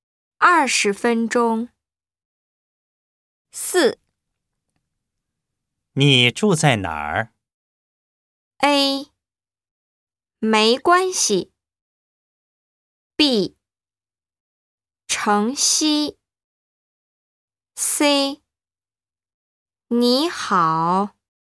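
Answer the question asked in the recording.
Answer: B: 城西。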